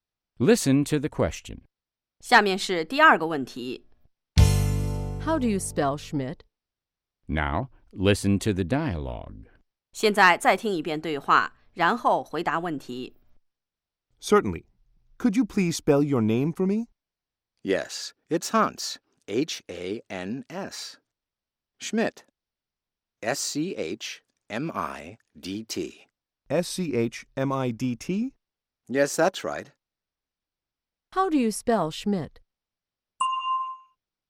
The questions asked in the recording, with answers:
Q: How do you spell Schmidt?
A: S-C-H.M-I-D-T.